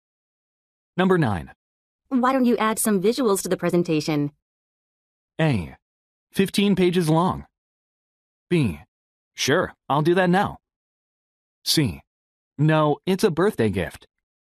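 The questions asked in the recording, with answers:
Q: Why don't you add some visuals to the presentation?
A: B: Sure, I'll do that now.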